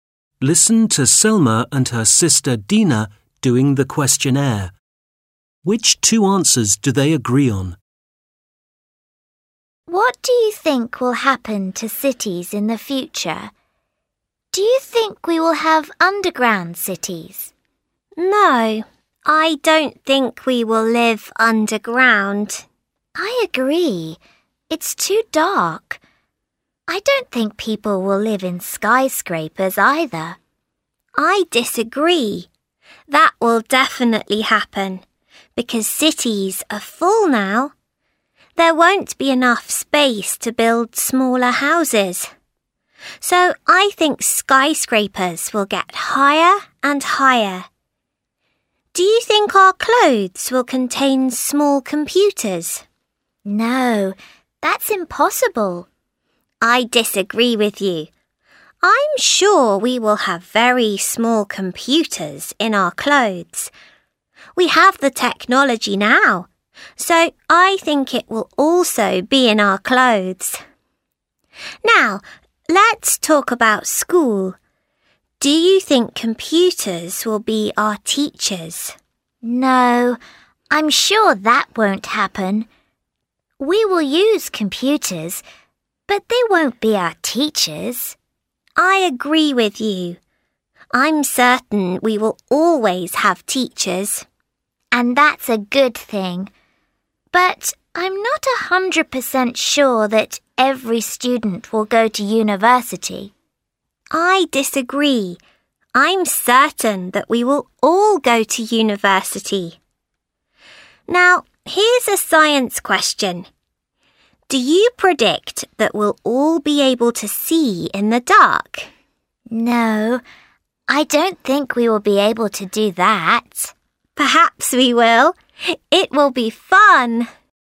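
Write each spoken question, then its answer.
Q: Which two answers do they agree on?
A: We won't live in underground cities, and computers won't be our teachers.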